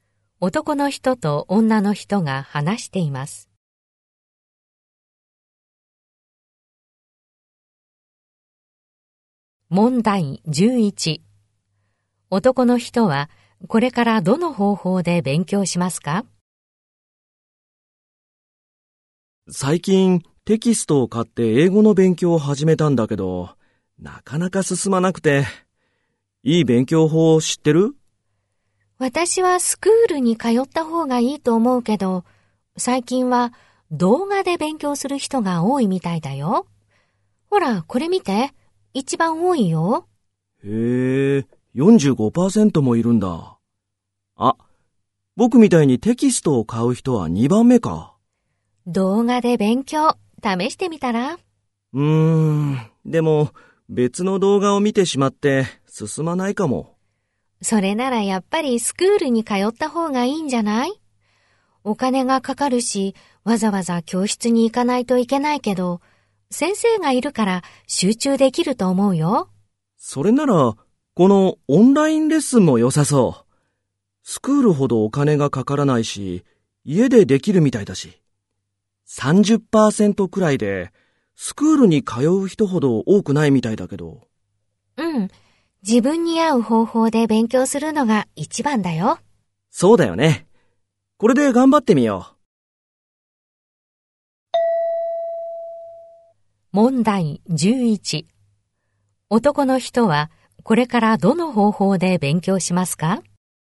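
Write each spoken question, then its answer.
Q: 男の人はこれからどの方法で勉強しますか?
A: オンラインレッスン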